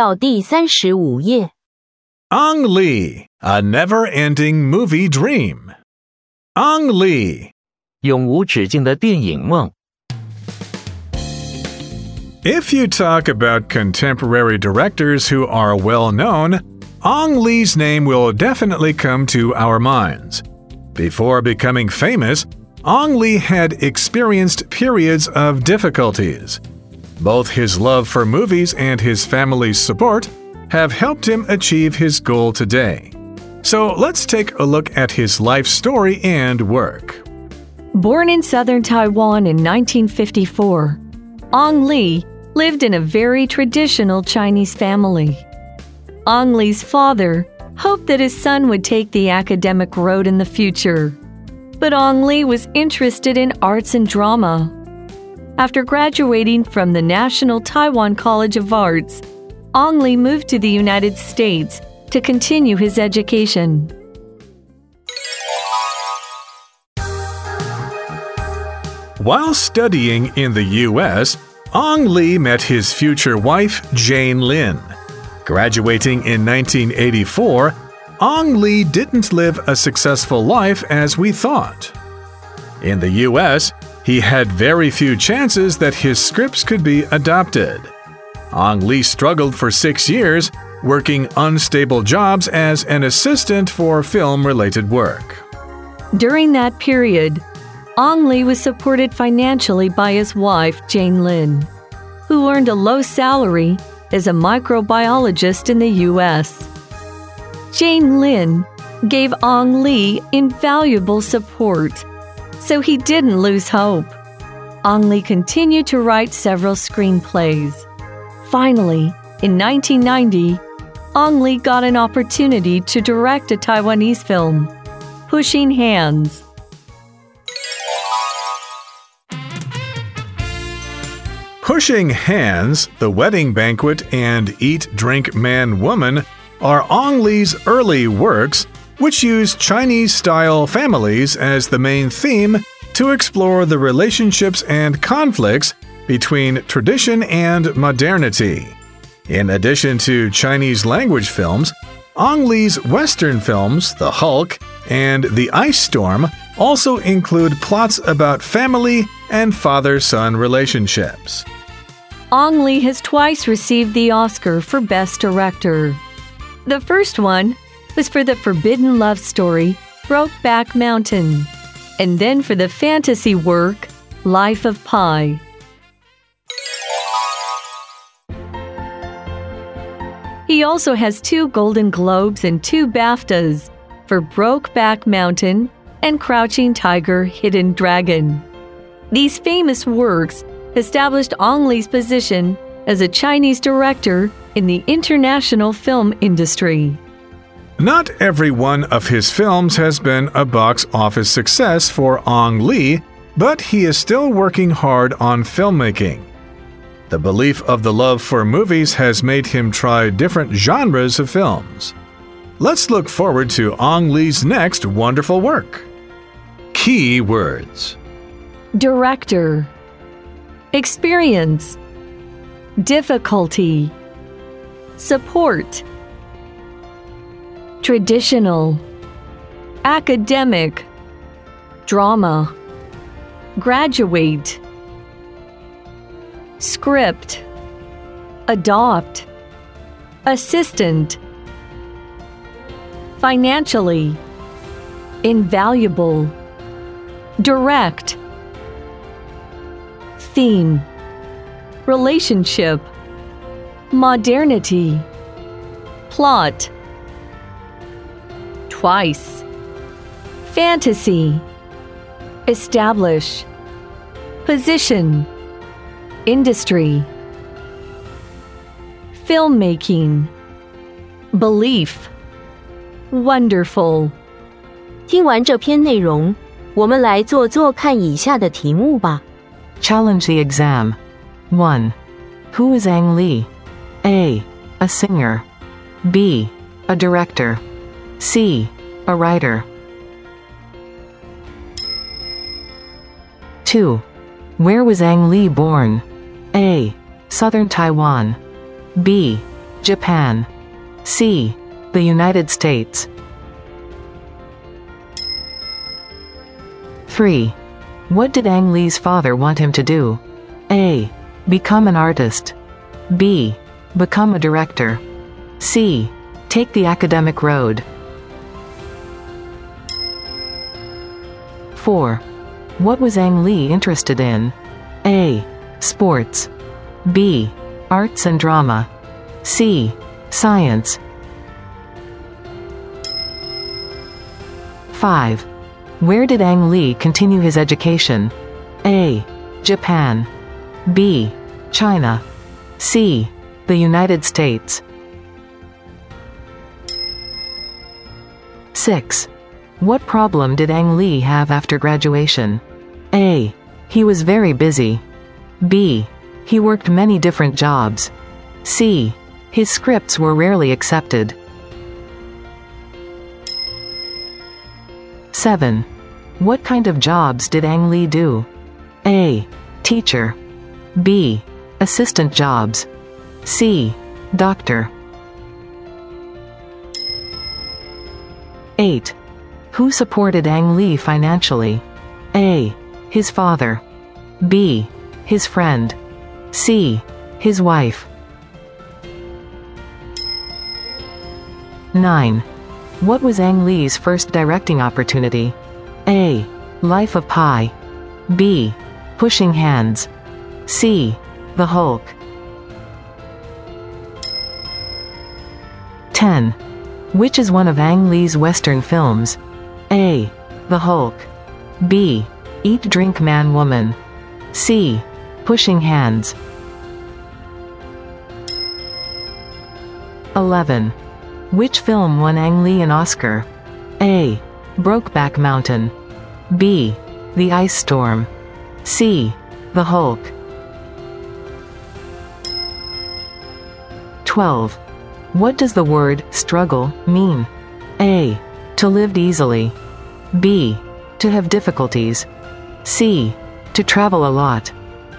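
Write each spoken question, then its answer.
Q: Who is Ang Lee?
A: B: A director.

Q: Where was Ang Lee born?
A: A: Southern Taiwan.

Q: What did Ang Lee's father want him to do?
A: C: Take the academic road.

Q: What was Ang Lee interested in?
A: B: Arts and drama.

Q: Where did Ang Lee continue his education?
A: C: The United States.

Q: What problem did Ang Lee have after graduation?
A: C: His scripts were rarely accepted.

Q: What kind of jobs did Ang Lee do?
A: B: Assistant jobs.

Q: Who supported Ang Lee financially?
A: C: His wife.

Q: What was Ang Lee's first directing opportunity?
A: B: Pushing Hands.

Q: Which is one of Ang Lee's Western films?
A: A: The Hulk.

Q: Which film won Ang Lee an Oscar?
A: A: Brokeback Mountain.

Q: What does the word struggle mean?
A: B: To have difficulties.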